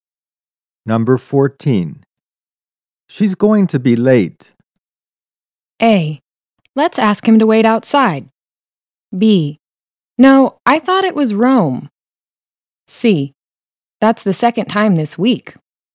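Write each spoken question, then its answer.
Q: She's going to be late.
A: C: That's the second time this week.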